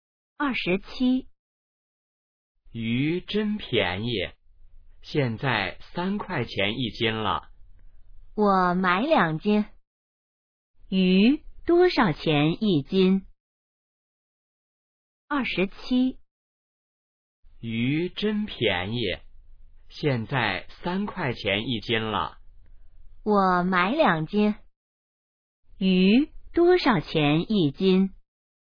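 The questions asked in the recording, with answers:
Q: 鱼多少钱一斤?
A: 3块钱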